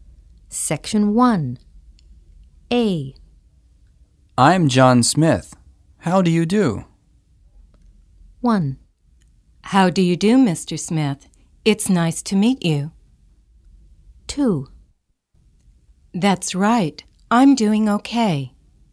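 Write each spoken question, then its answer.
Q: I'm John Smith. How do you do?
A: 1: How do you do, Mr. Smith? It's nice to meet you.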